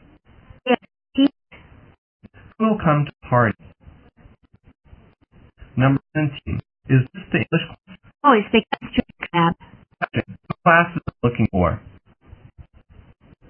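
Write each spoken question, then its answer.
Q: What class is it looking for?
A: The English class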